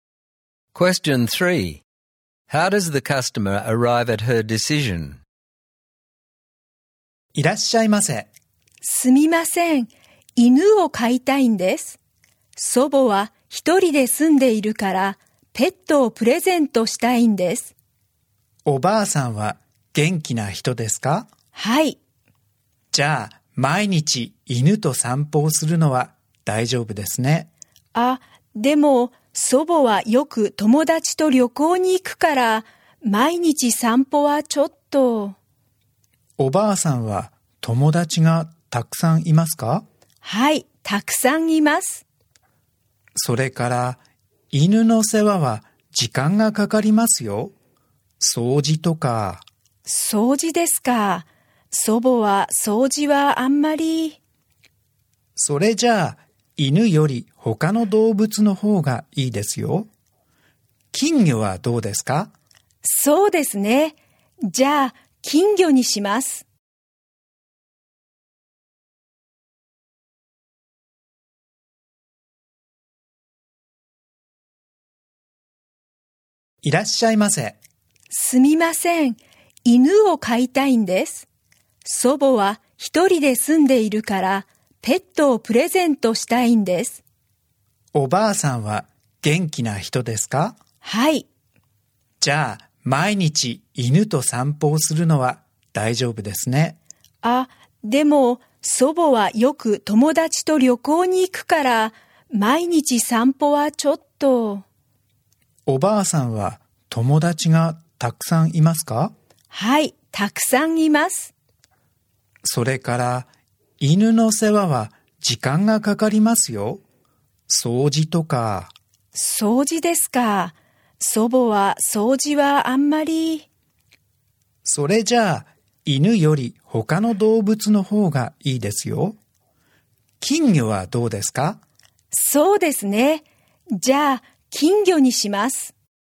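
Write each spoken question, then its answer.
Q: How does the customer arrive at her decision?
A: Her grandmother often travels with friends and doesn't like cleaning, so she can't walk or care for a dog. She takes the shop assistant's advice and chooses a goldfish.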